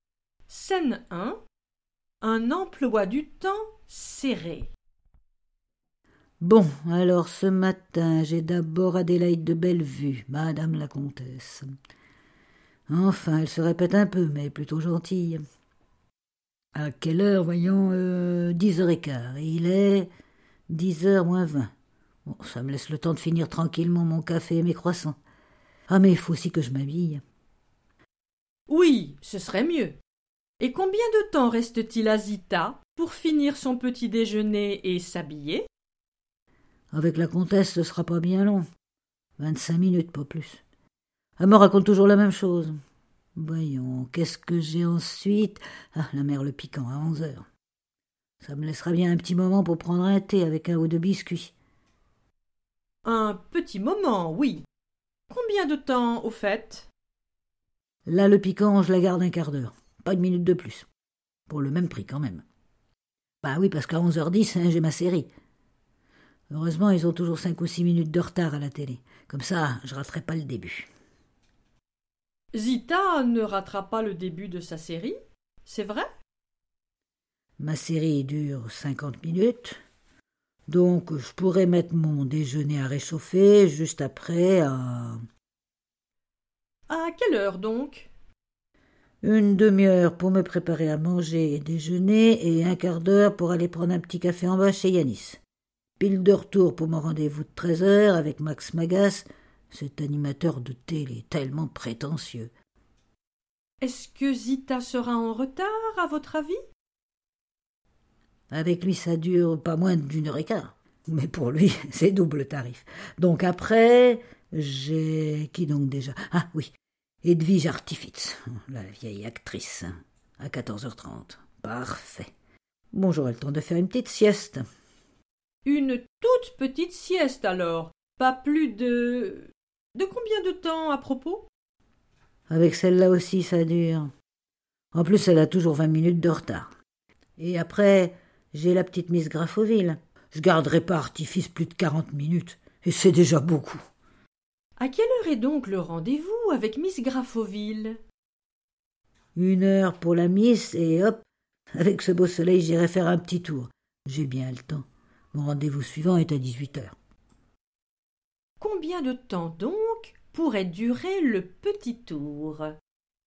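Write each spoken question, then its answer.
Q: Un petit moment, oui. Combien de temps, au fait?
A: 20 minutes

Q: Zita ne ratera pas le début de sa série, c'est vrai?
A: Oui, c'est vrai

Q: Est-ce que Zita sera en retard, à votre avis?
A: Non

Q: Pas plus de... De combien de temps, à propos?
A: 15 minutes

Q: À quelle heure est donc le rendez-vous avec Miss Graffoville?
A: 15h30

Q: Combien de temps donc pourrait durer le petit tour ?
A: 1 heure et demie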